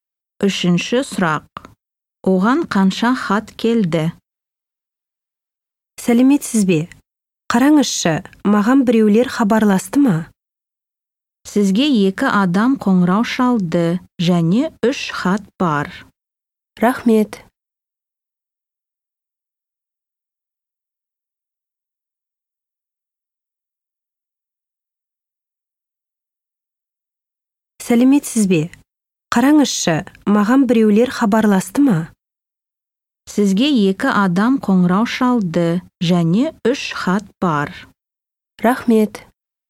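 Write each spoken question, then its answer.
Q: Оған қанша хат келді?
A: Үш хат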